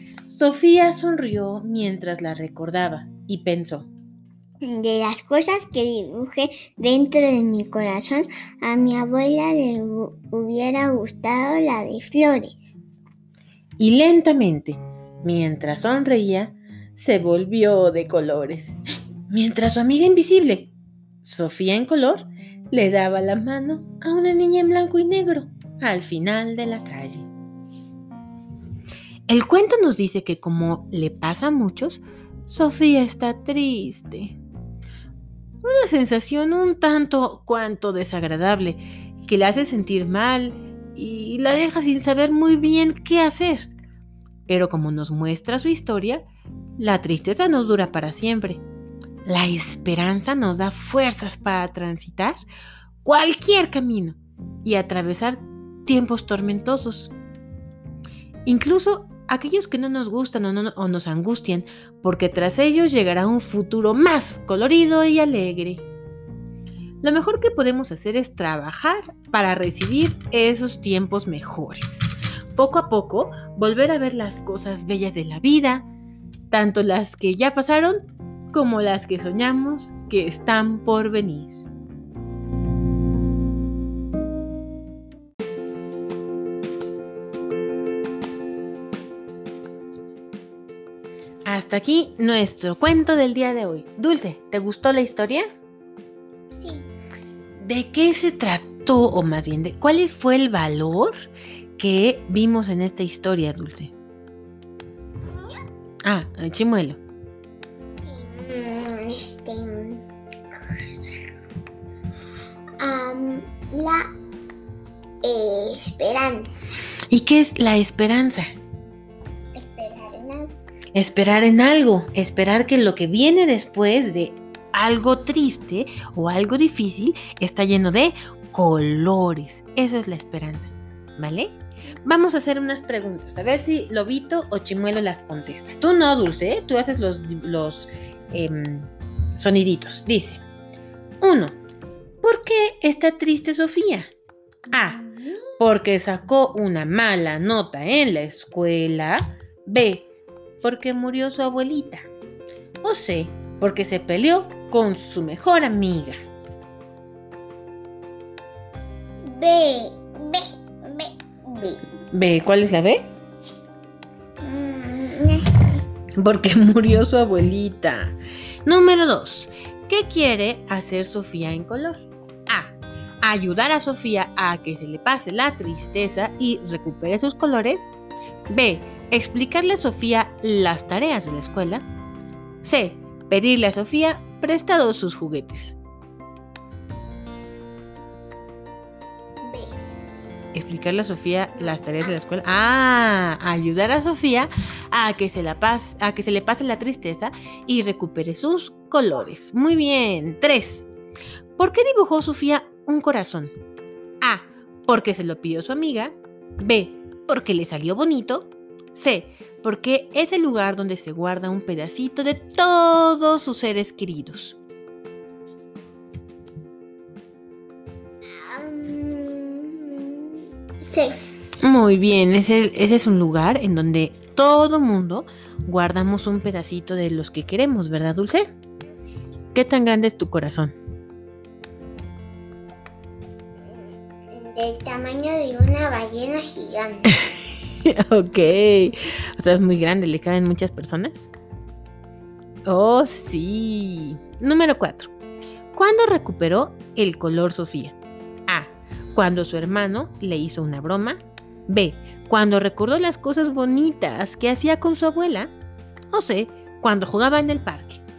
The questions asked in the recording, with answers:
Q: ¿Cuándo recuperó el color Sofía?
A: B, ah, Lobito le